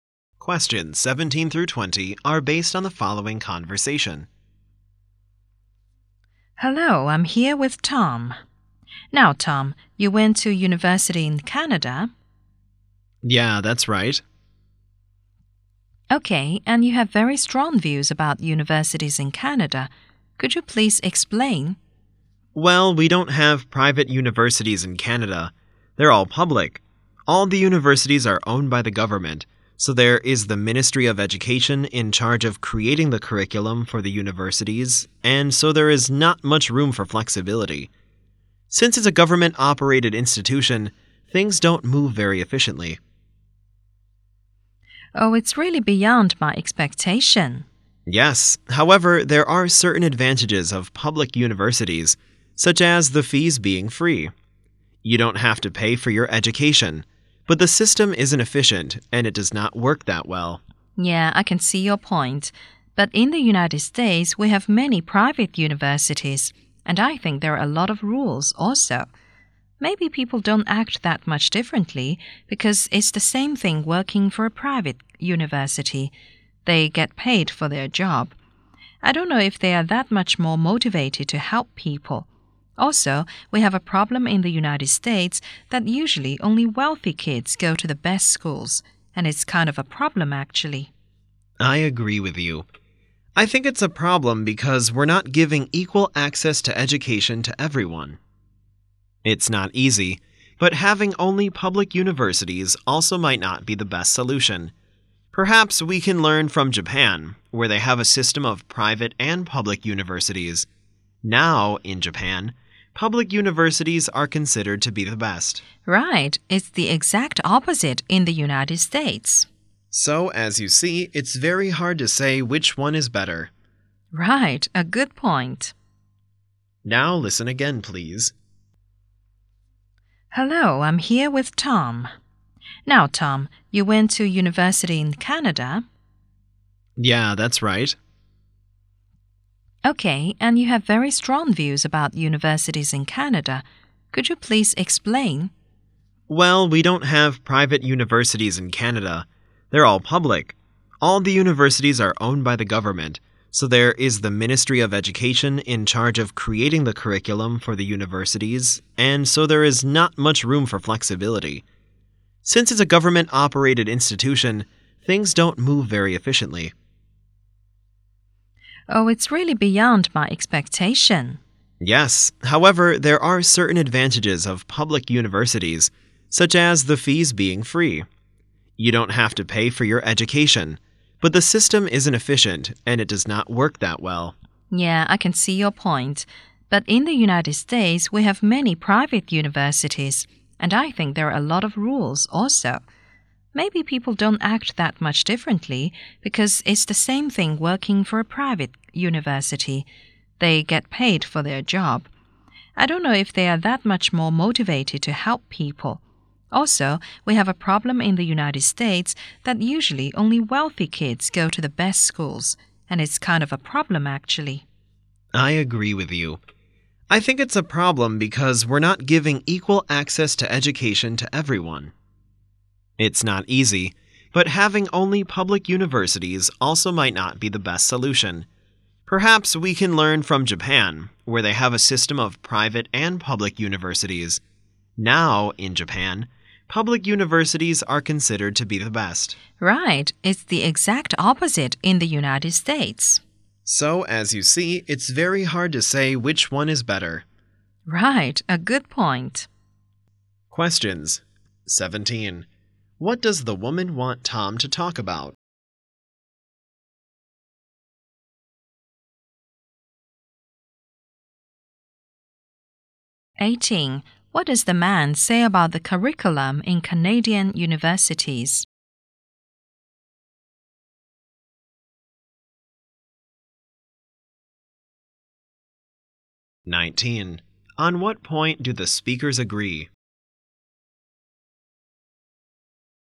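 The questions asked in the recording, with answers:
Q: What does the woman want Tom to talk about?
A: His views on universities in Canada

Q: What does the man say about the curriculum in Canadian universities?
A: It is set by the Ministry of Education and is not flexible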